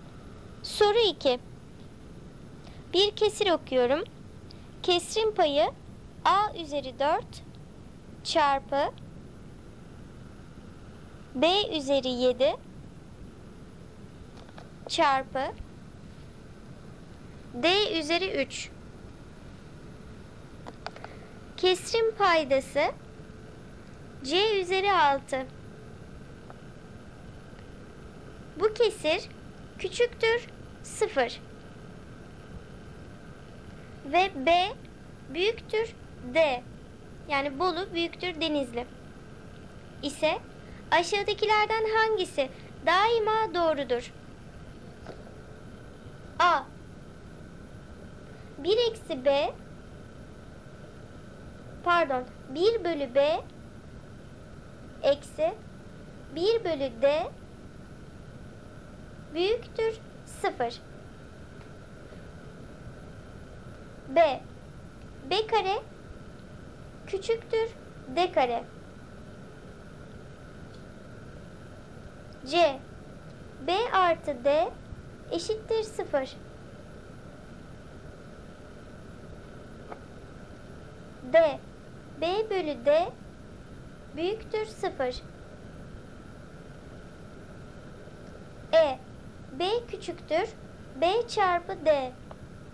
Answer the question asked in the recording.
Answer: Doğru cevap A seçeneği.